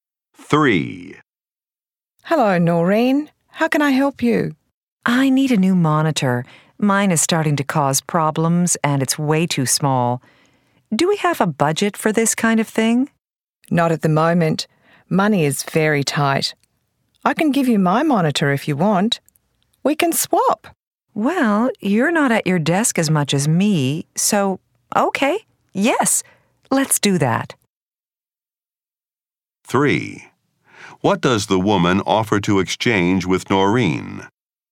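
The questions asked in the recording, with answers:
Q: What does the woman offer to exchange with Noreen?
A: Her monitor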